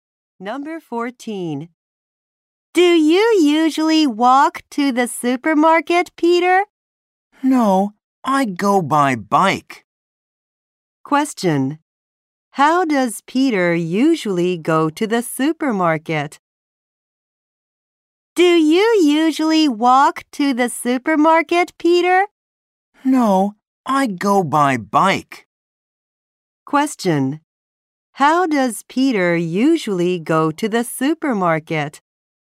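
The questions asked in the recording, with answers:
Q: How does Peter usually go to the supermarket?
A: By bike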